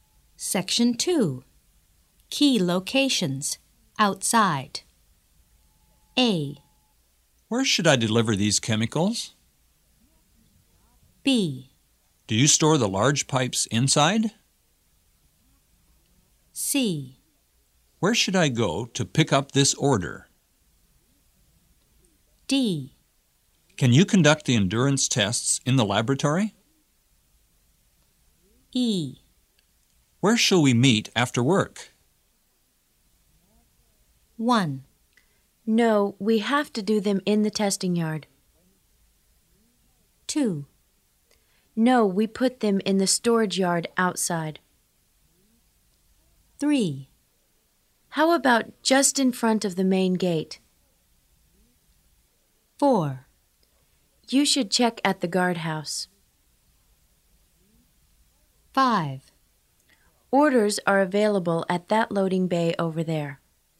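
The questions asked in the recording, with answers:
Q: No, we have to do them in the testing yard.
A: D: Can you conduct the endurance tests in the laboratory?

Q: No, we put them in the storage yard outside.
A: B: Do you store the large pipes inside?

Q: How about just in front of the main gate?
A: E: Where shall we meet after work?

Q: Orders are available at that loading bay over there.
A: C: Where should I go to pick up this order?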